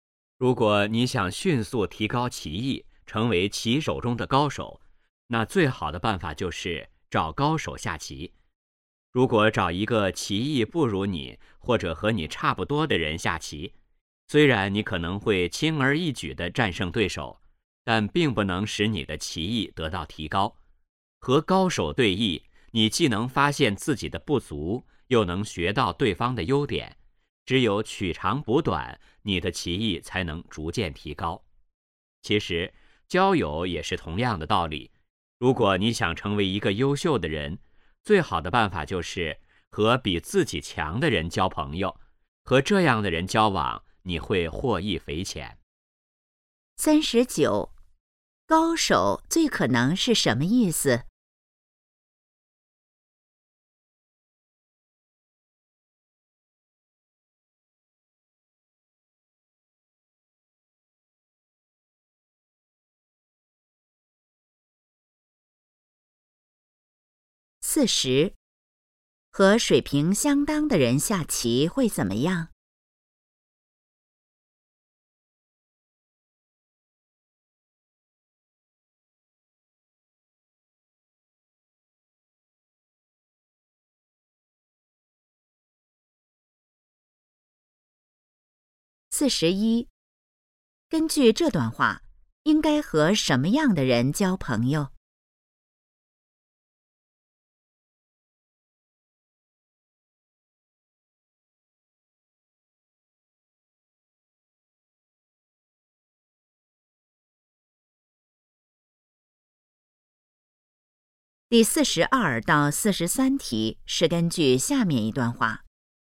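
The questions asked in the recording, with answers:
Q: 高手最可能是什么意思?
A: 技艺高超的人

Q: 和水平相当的人下棋会怎么样?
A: 棋艺得不到提高

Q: 根据这段话,应该和什么样的人交朋友?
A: 比自己强的人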